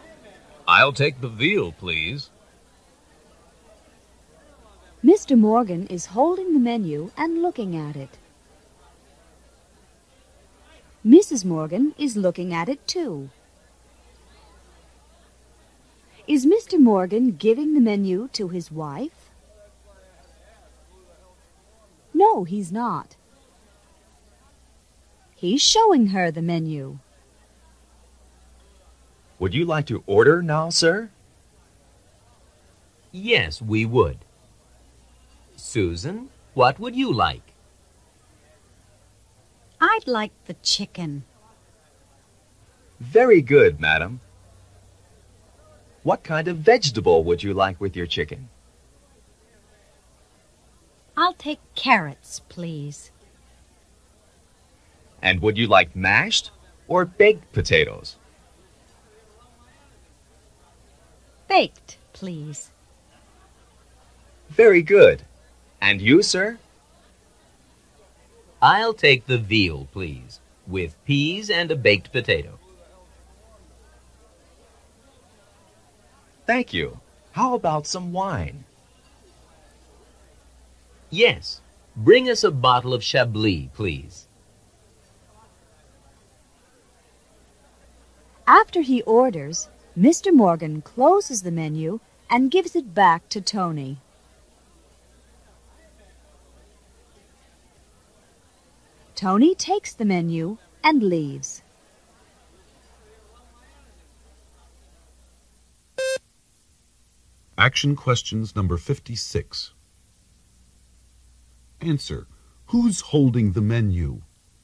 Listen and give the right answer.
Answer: Mr. Morgan is.